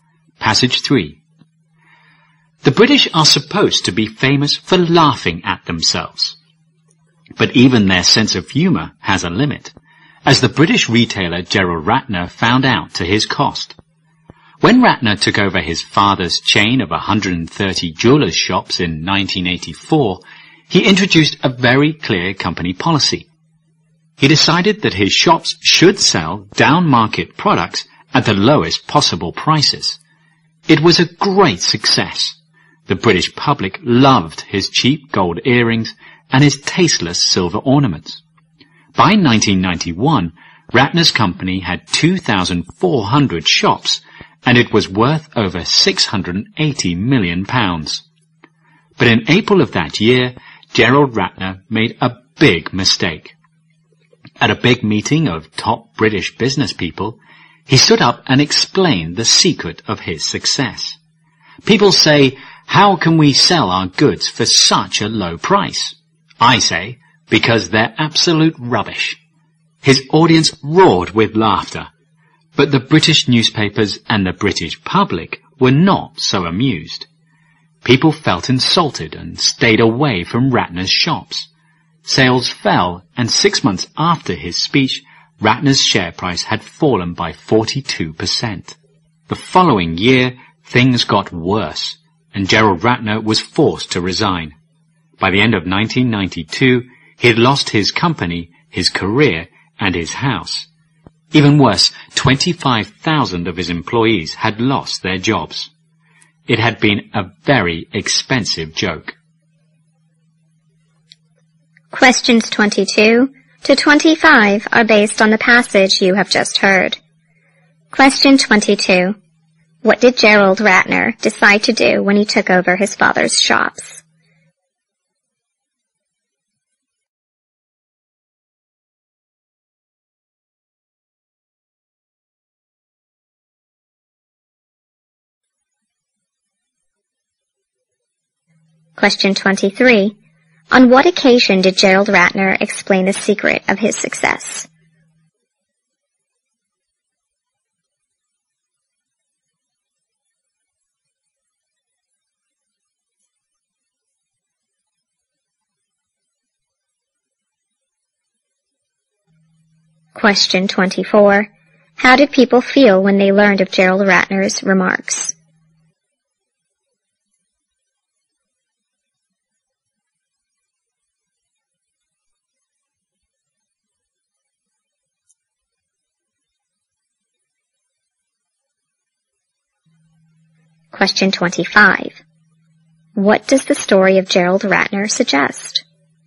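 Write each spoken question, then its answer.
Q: What did Gerald Ratner decide to do when he took over his father's shops?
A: Sell down-market products at the lowest possible prices.

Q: On what occasion did Gerald Ratner explain the secret of his success?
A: At a big meeting of top British business people.

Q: How did people feel when they learned of Gerald Ratner's remarks?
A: Insulted.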